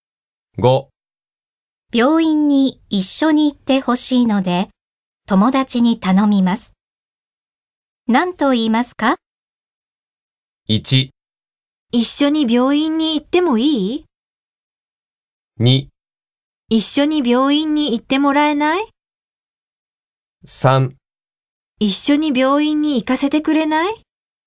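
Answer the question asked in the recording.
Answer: 2: 一緒に病院に行ってもらえない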